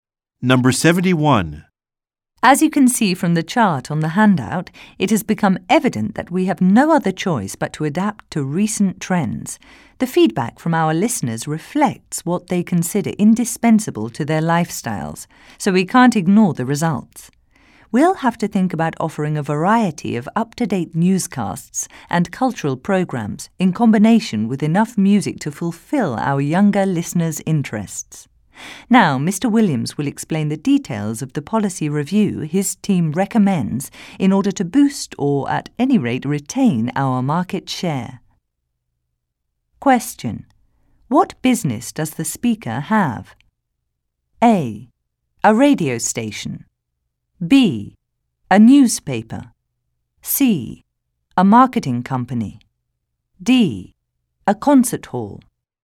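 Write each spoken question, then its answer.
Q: What business does the speaker have?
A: A: A radio station.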